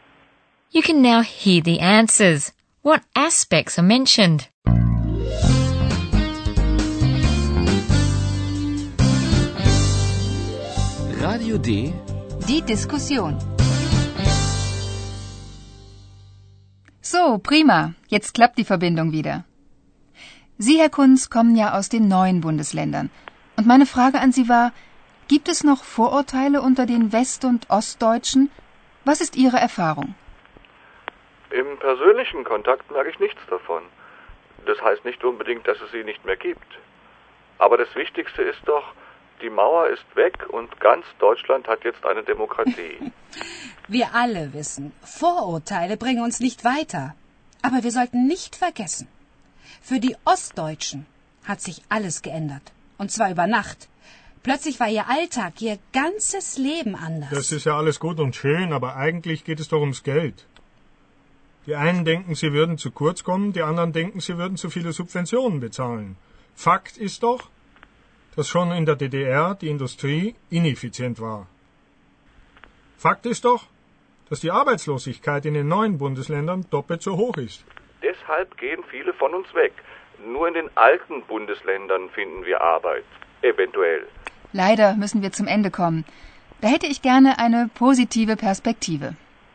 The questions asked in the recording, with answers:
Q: What aspects are mentioned?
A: Herr Kunz says that he doesn't notice any prejudices as far as personal contacts go.